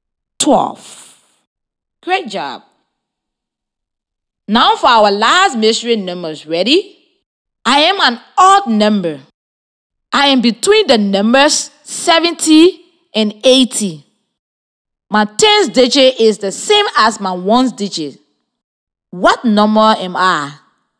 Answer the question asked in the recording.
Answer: The mystery number is 77.